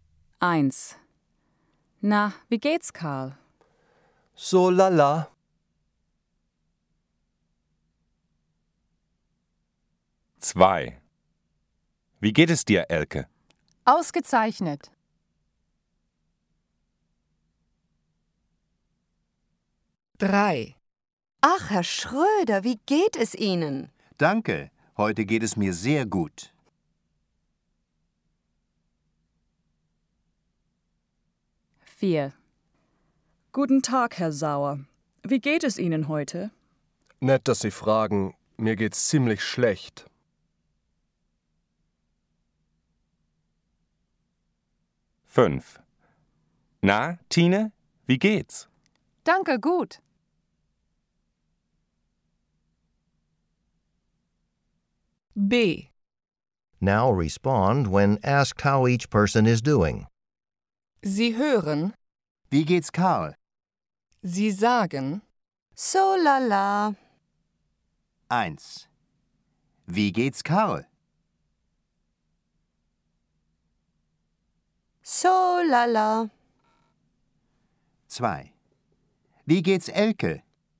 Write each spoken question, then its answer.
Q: Wie geht's Elke?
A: Ausgezeichnet.